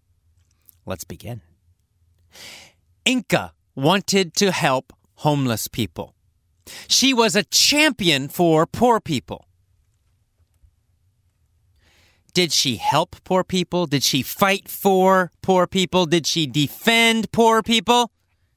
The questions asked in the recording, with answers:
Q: Did she help poor people?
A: Yes, that's right. She was a champion for poor people.